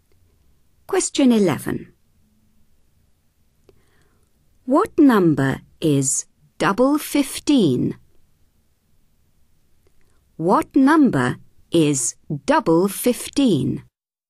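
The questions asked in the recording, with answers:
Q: What number is double 15?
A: 30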